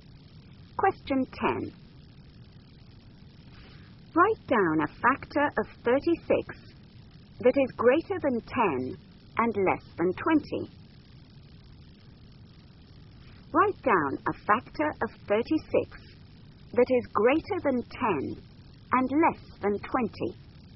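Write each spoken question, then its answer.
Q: Write down a factor of 36 that is greater than 10 and less than 20.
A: 12 or 18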